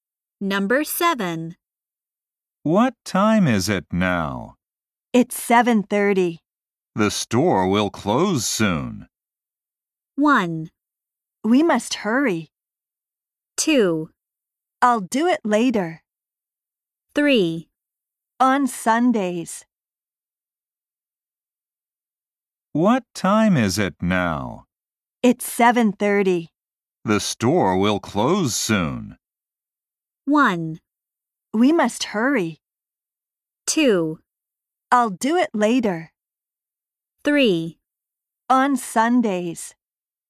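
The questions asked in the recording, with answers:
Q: The store will close soon.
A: 1: We must hurry.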